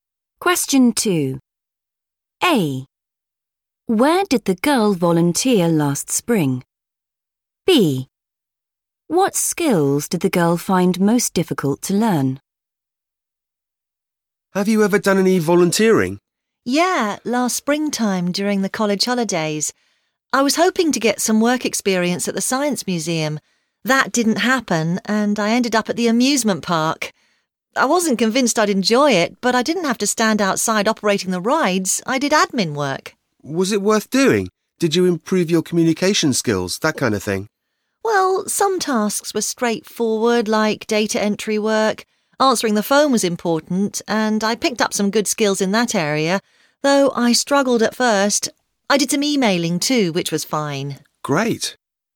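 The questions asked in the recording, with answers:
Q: Where did the girl volunteer last spring?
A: amusement park

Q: What skills did the girl find most difficult to learn?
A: answering the phone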